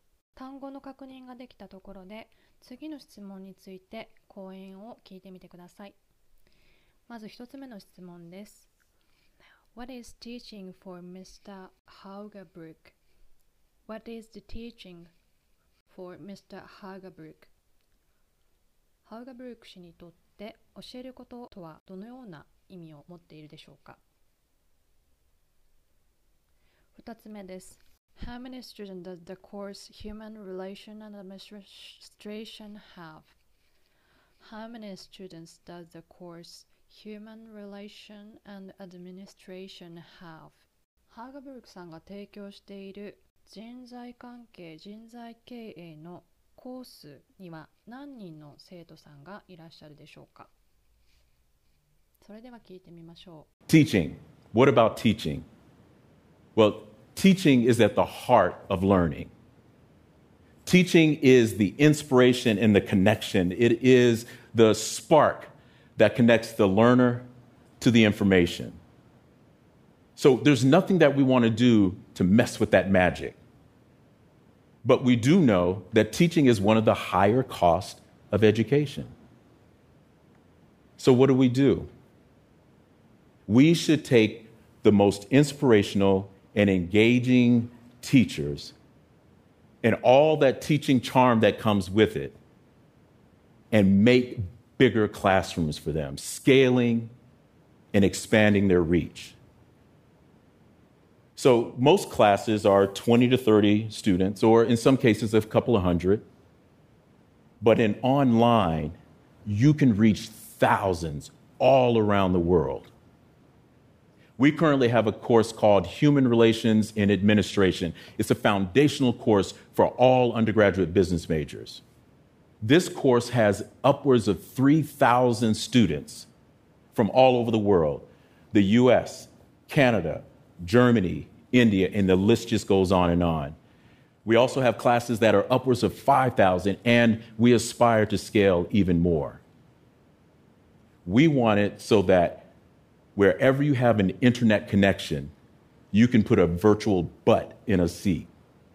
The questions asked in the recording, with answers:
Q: What is teaching for Mr.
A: Teaching is at the heart of learning.

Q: How many students does the course Human Relation and Administration have?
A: This course has upwards of 3,000 students